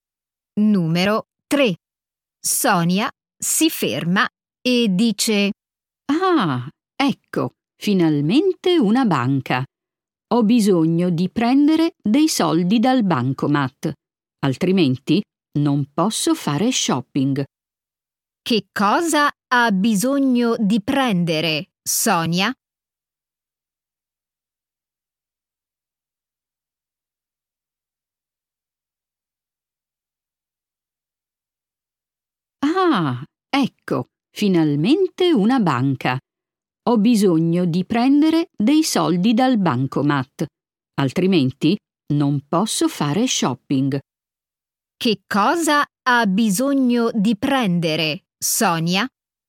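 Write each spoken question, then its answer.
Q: Che cosa ha bisogno di prendere, Sonia?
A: dei soldi dal bancomat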